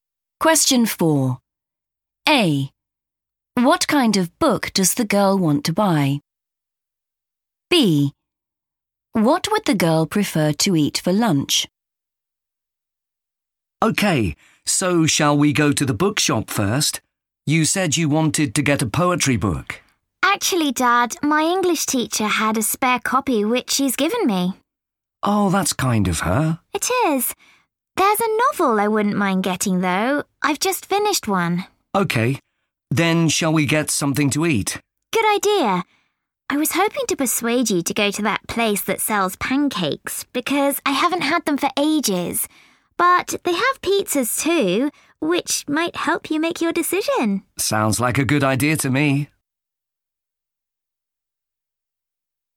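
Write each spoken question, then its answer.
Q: What kind of book does the girl want to buy?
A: a novel

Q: What would the girl prefer to eat for lunch?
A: pancakes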